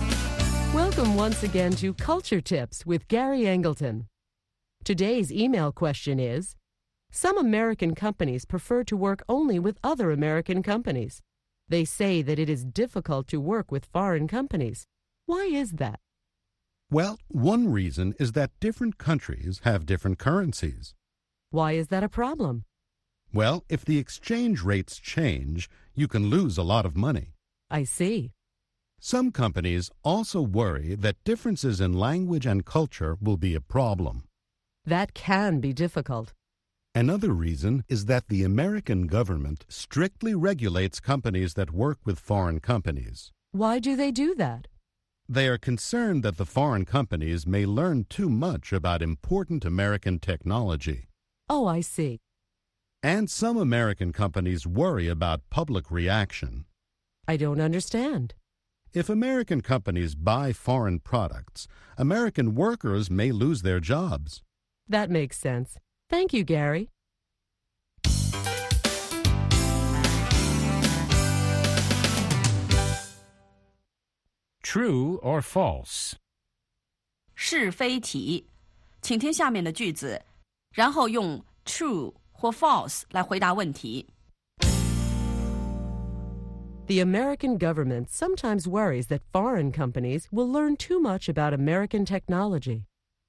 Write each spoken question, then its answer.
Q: The American government sometimes worries that foreign companies will learn too much about American technology.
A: True. That's why the American government regulates companies that do business with foreign companies.